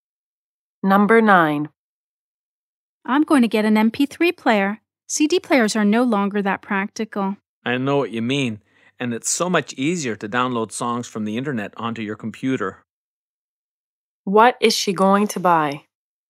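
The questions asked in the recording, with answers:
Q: What is she going to buy?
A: An MP3 player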